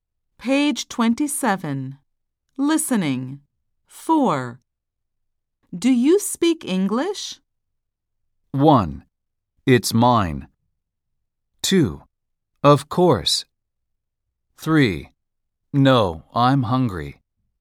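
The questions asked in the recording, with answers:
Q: Do you speak English?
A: 2: Of course.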